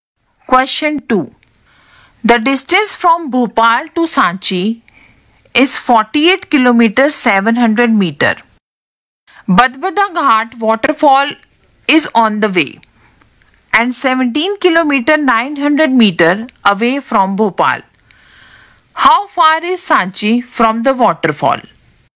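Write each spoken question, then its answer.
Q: How far is Sanchi from the waterfall?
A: 30 km 800 m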